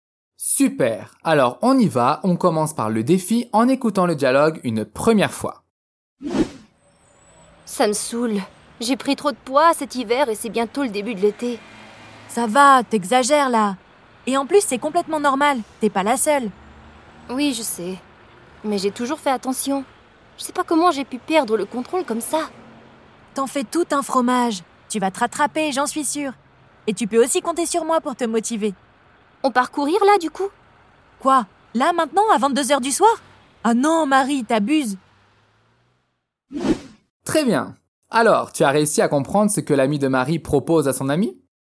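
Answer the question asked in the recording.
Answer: D'aller courir tout de suite, à 22h du soir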